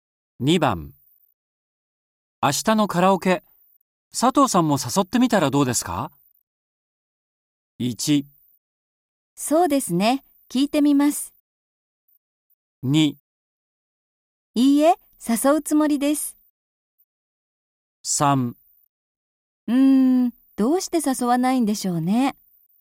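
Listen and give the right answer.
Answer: 1: そうですね、聞いてみます。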